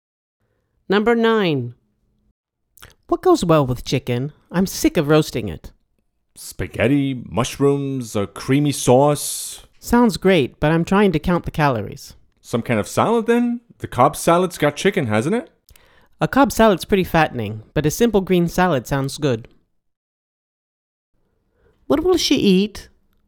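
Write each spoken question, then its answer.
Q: What will she eat?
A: A green salad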